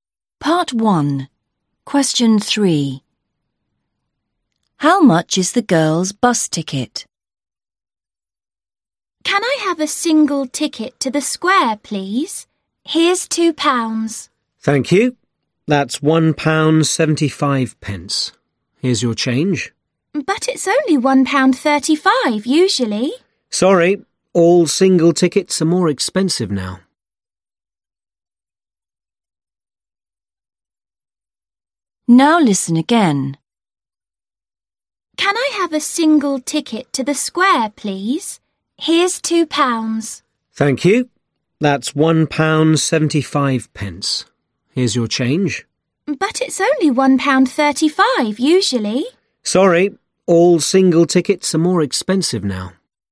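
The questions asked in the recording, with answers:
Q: How much is the girl's bus ticket?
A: £1.75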